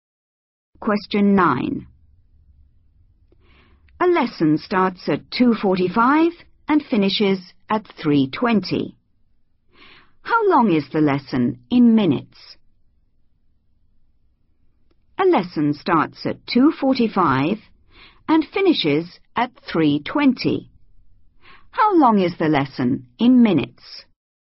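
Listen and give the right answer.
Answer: 35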